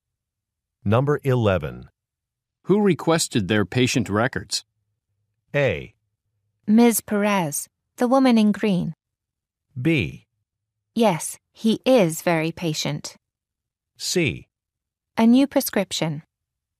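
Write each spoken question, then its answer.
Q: Who requested their patient records?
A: A: Ms. Perez, the woman in green.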